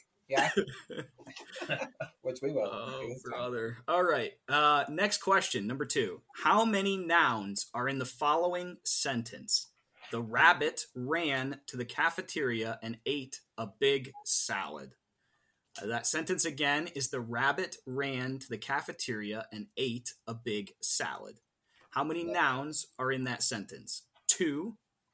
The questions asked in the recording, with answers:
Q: How many nouns are in the following sentence?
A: The correct answer is 3.